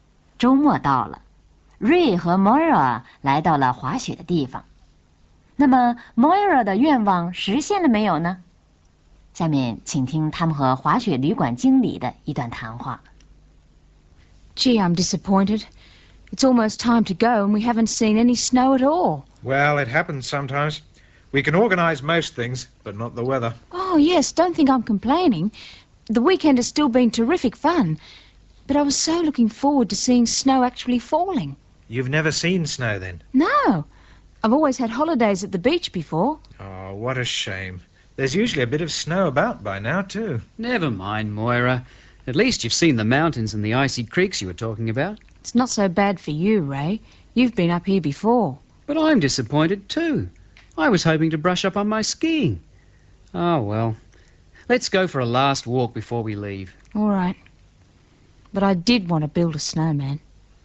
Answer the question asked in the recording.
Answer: 没有,因为根本没有下雪。